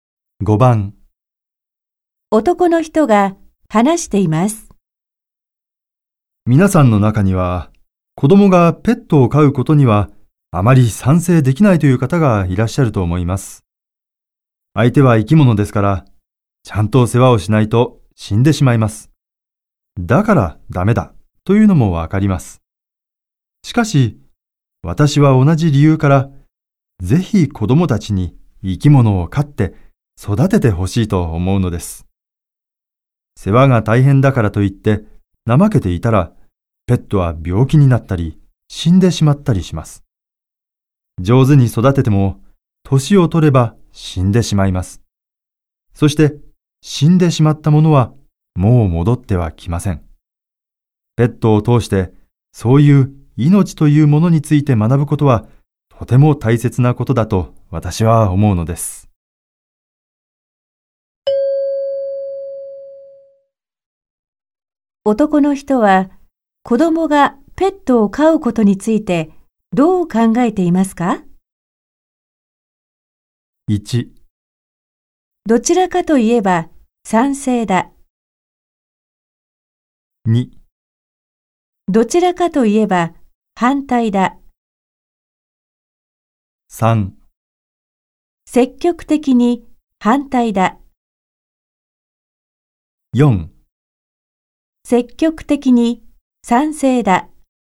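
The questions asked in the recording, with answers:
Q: 男の人は子供がペットを飼うことについてどう考えていますか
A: 4: 積極的に賛成だ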